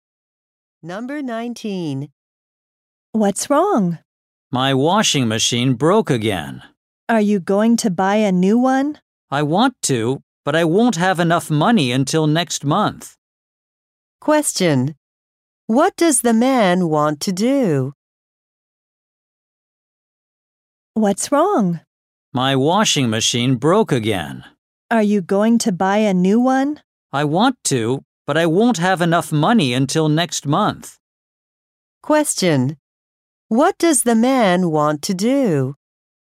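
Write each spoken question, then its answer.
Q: What does the man want to do?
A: Buy a new washing machine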